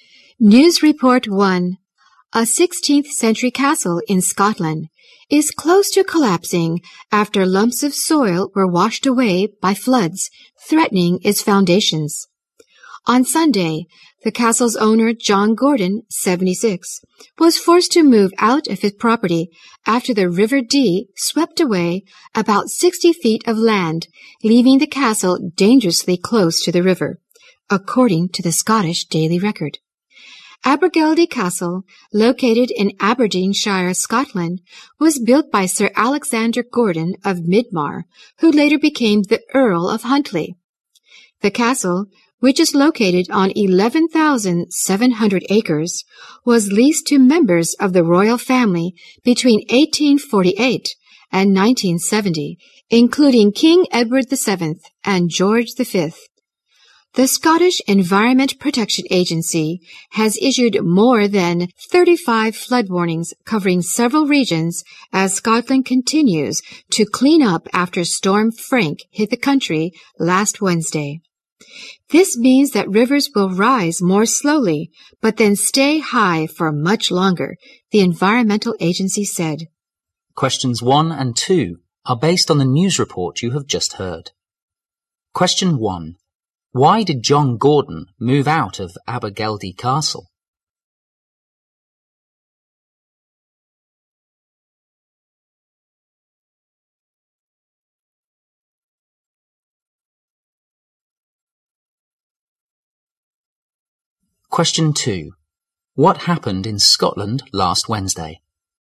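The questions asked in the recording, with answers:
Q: Why did John Gordon move out of Abergeldy Castle?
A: The river swept away land, leaving the castle dangerously close to collapse

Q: What happened in Scotland last Wednesday?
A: Storm Frank hit the country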